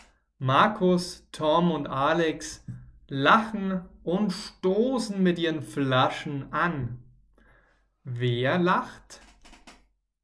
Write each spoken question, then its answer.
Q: Wer lacht?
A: Markus, Tom und Alex. Sie lachen.